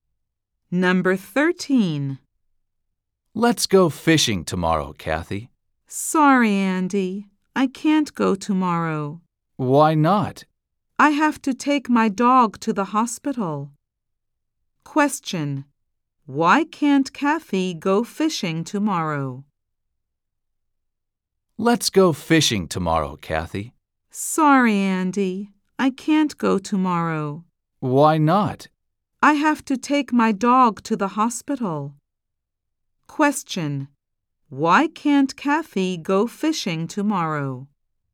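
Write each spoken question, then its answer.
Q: Why can't Kathy go fishing tomorrow?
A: She has to take her dog to the hospital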